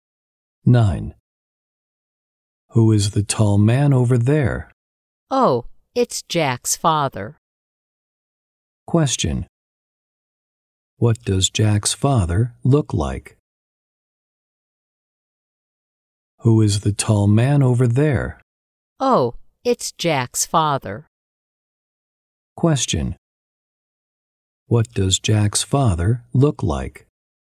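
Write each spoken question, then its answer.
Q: What does Jack's father look like?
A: He is tall.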